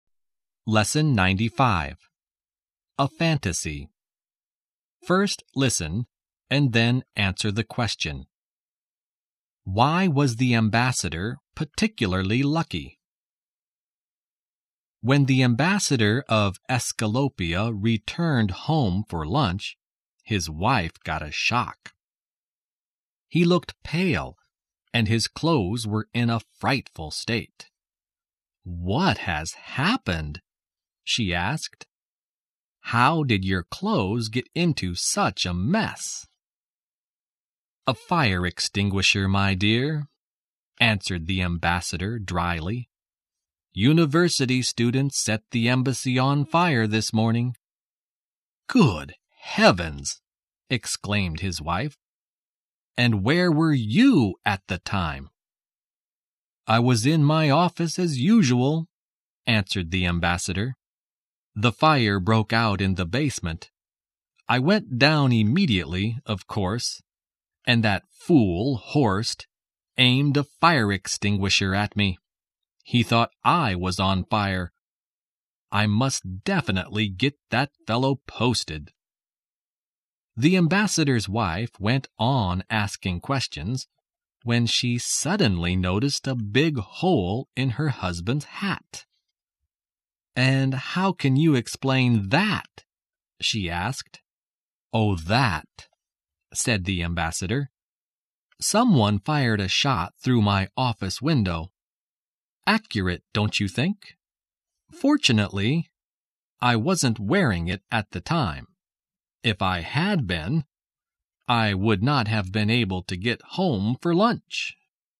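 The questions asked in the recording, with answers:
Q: Why was the ambassador particularly lucky?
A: He wasn't wearing his hat when someone fired a shot through it, so he wasn't hurt.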